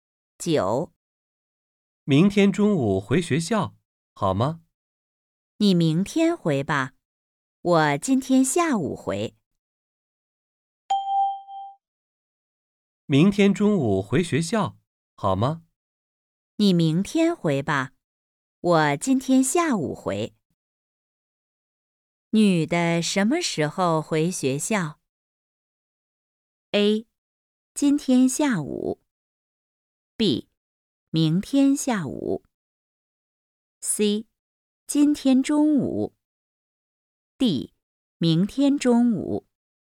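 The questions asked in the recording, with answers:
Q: 女的什么时候回学校?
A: A: 今天下午。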